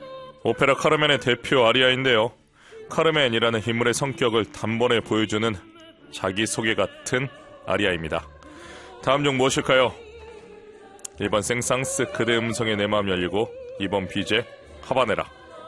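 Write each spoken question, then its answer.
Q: 다음 중 무엇일까요? 1번 생상스, 그대 음성에 내 마음 열리고, 2번 비제, 하바네라.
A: 2번: 비제, 하바네라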